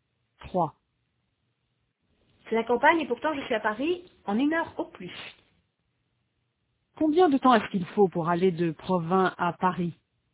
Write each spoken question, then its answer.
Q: Combien de temps est-ce qu'il faut pour aller de Provins à Paris?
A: Une heure au plus.